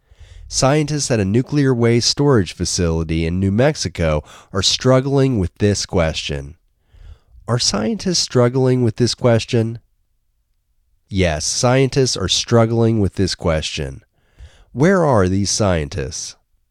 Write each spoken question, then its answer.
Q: Where are these scientists?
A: These scientists are at a nuclear waste storage facility in New Mexico.